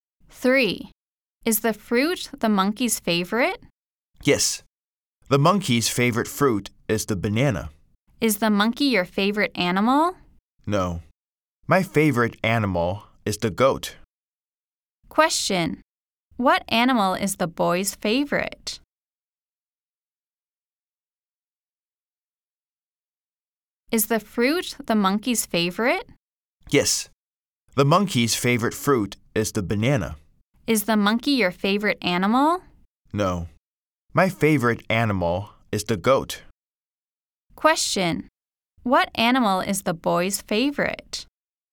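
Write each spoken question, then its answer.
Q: Question, what animal is the boy's favorite?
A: The goat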